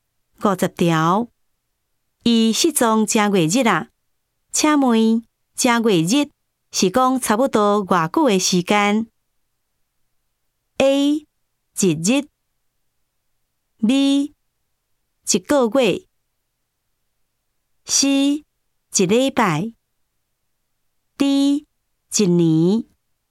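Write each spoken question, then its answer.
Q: 请问正月日是讲差不多偌久的时间 ?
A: B: 一个月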